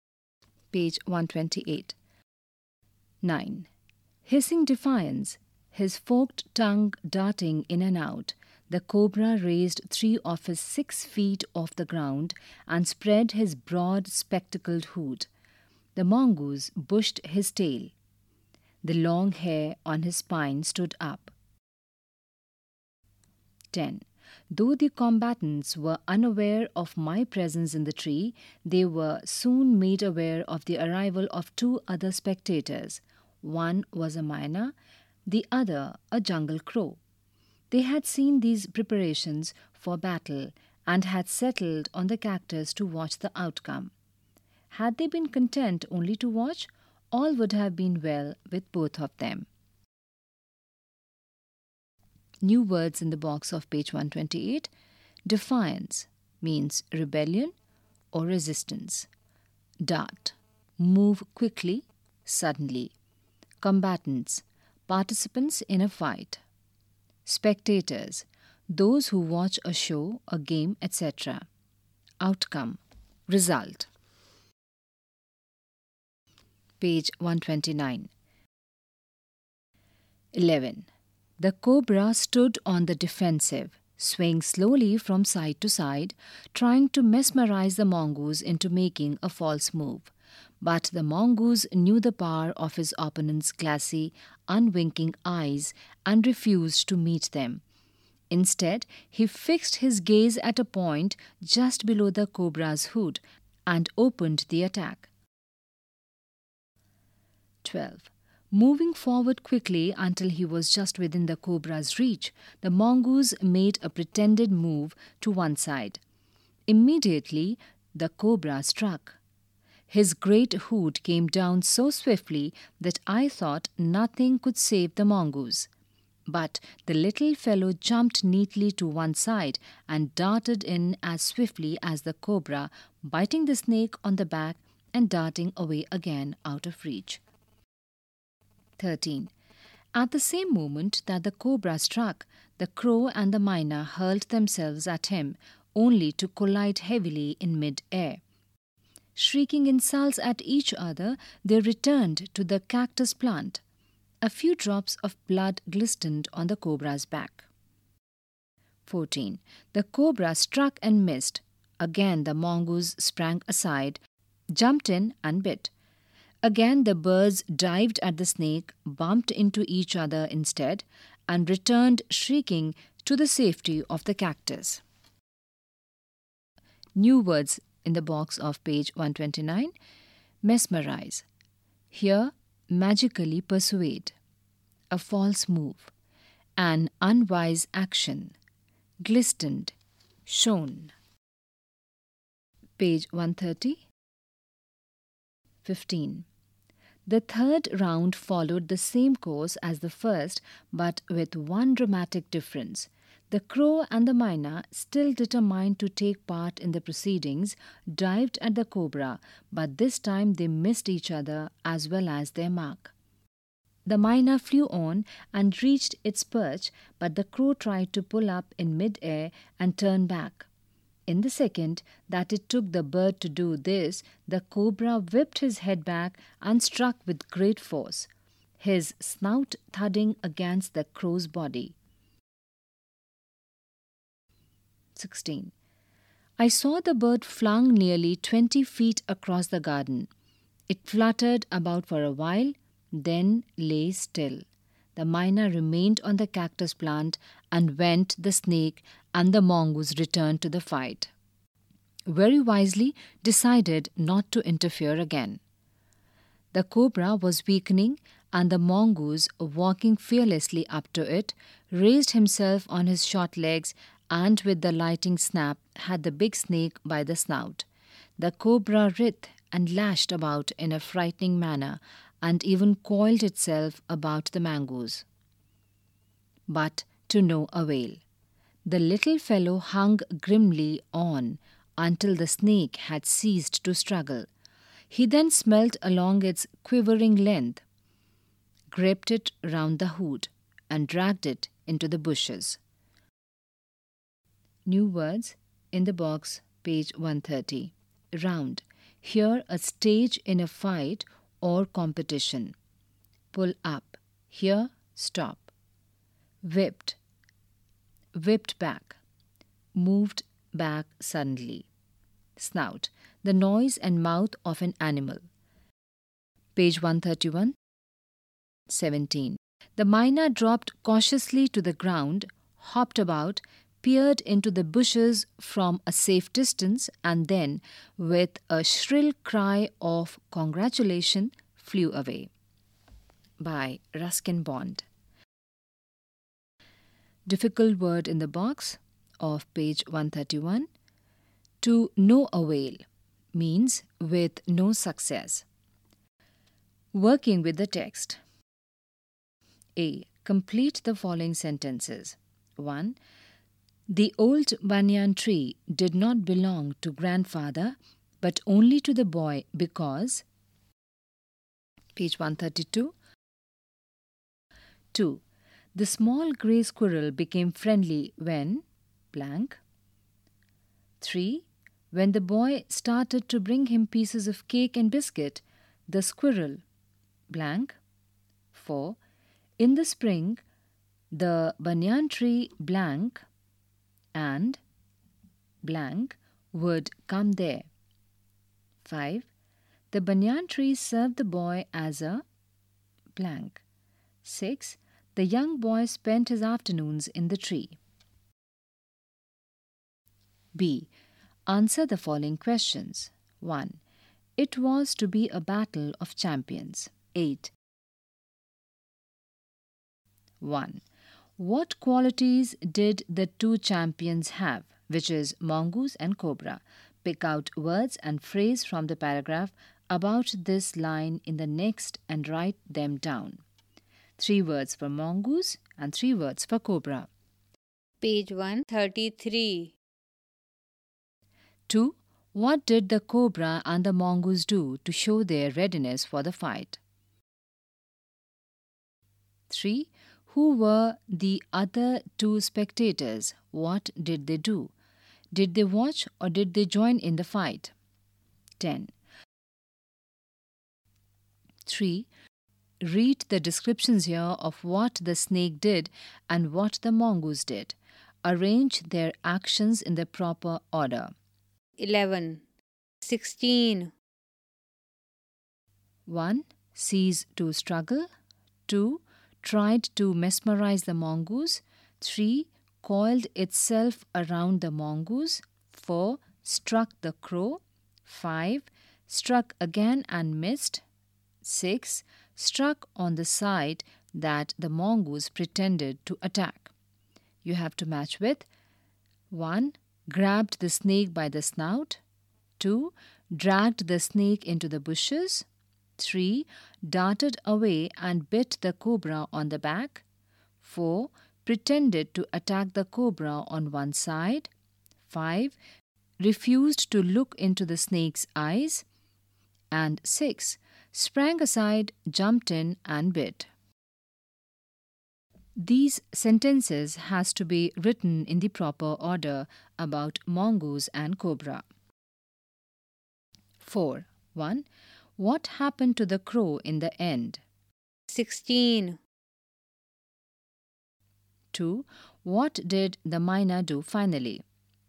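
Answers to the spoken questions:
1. The cobra struck it and flung it nearly 20 feet across the garden, where it fluttered about and then lay still (died).
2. It dropped cautiously to the ground, peered into the bushes from a safe distance, and flew away with a shrill cry of congratulation.
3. A myna and a jungle crow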